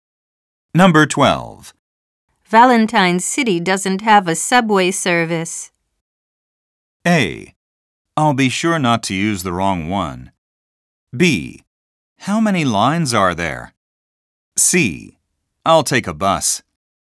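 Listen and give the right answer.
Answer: C: I'll take a bus.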